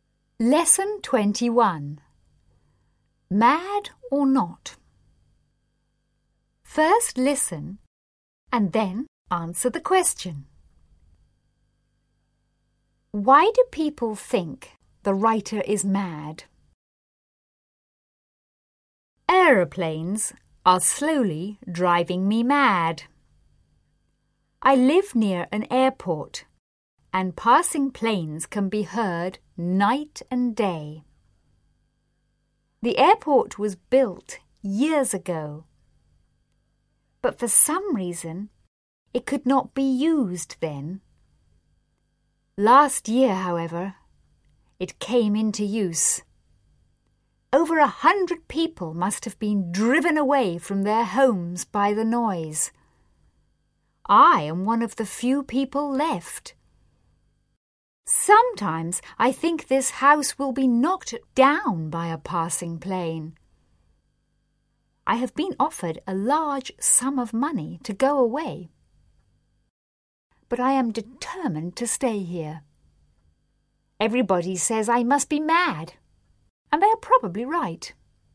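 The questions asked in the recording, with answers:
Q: Why do people think the writer is mad?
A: Because he refuses to leave his noisy house near the airport, even though he has been offered a large sum of money to go away.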